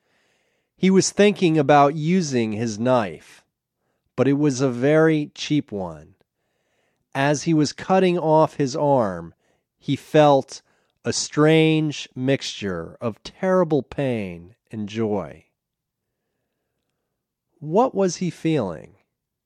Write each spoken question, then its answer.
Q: What was he feeling?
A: He was feeling a strange mixture of terrible pain and joy.